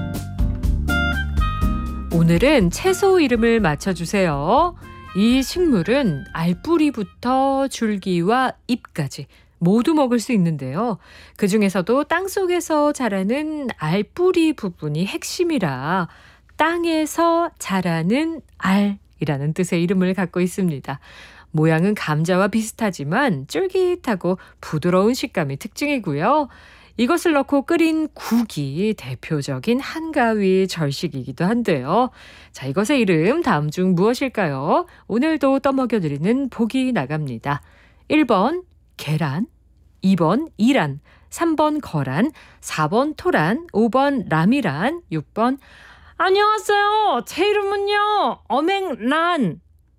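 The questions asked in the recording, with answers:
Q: 자, 이것의 이름 다음 중 무엇일까요?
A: 4: 토란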